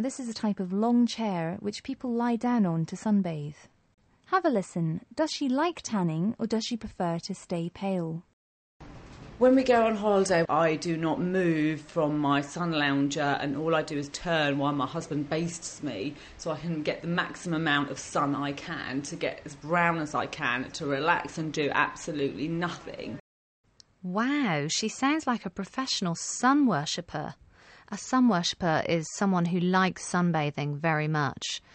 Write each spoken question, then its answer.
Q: Does she like tanning or does she prefer to stay pale?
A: Wow, she sounds like a professional sun worshipper.